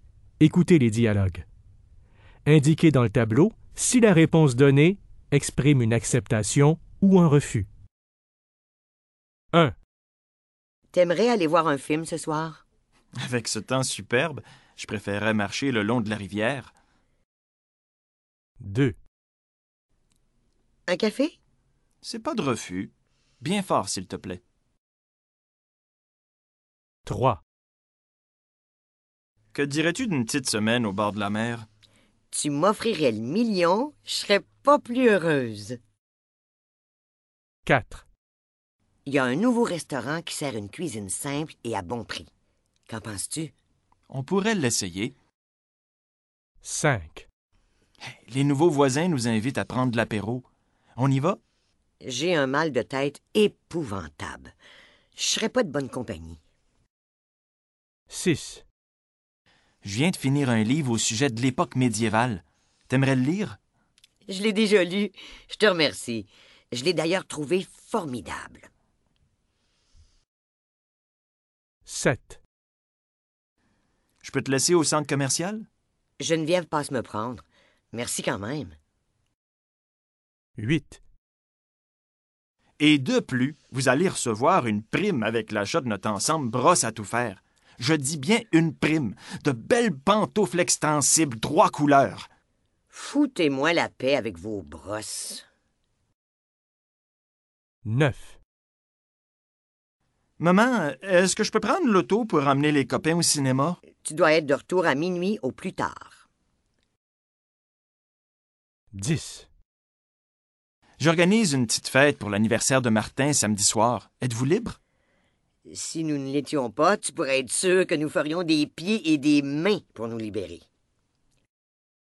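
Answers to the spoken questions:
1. refus
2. acceptation
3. acceptation
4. acceptation
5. refus
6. refus
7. refus
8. refus
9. acceptation
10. acceptation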